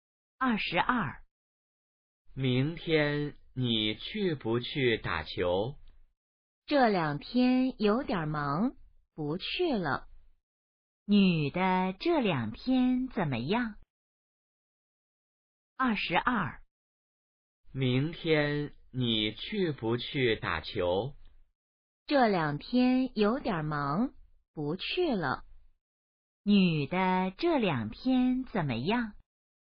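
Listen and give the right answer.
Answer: 有点忙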